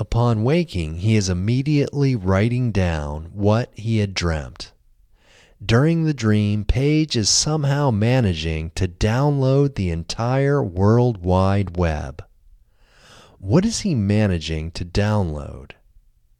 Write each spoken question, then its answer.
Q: What is he managing to download?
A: He is managing to download the entire World Wide Web, but he is just keeping the links.